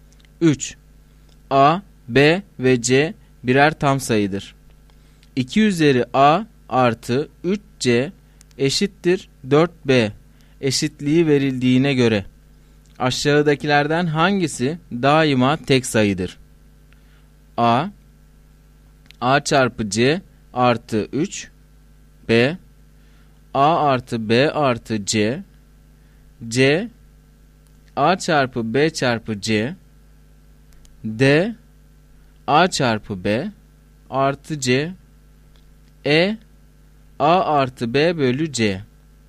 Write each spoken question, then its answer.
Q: 2 üzeri A artı 3C eşittir 4B eşitliği verildiğine göre aşağıdakilerden hangisi daima tek sayıdır?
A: Doğru cevap A şıkkı.